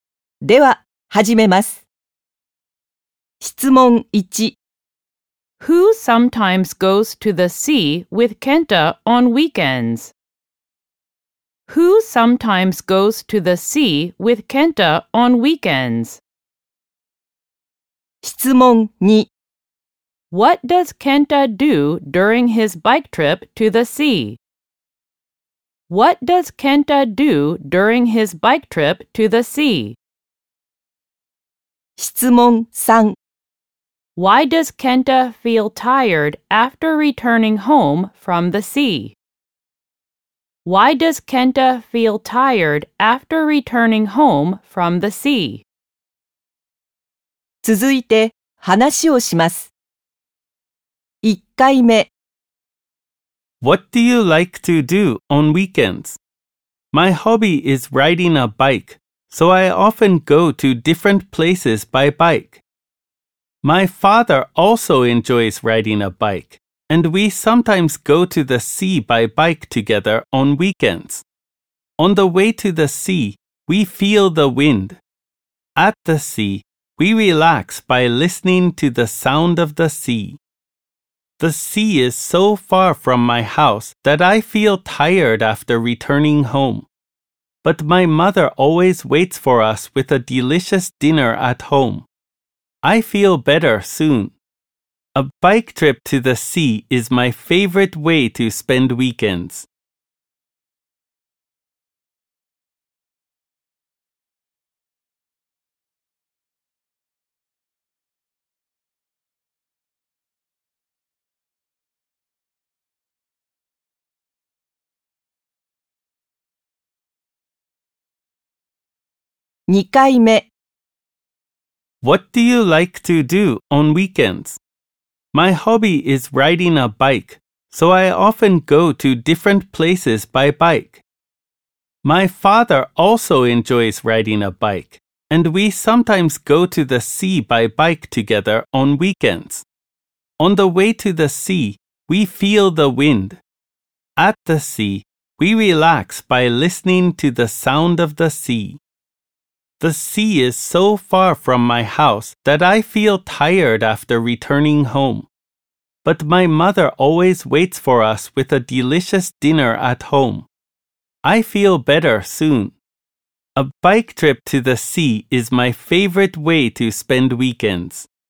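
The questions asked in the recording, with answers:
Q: Who sometimes goes to the sea with Kenta on weekends?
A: His father

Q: What does Kenta do during his bike trip to the sea?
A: He feels the wind and relaxes by listening to the sound of the sea

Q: Why does Kenta feel tired after returning home from the sea?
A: Because the sea is so far from his house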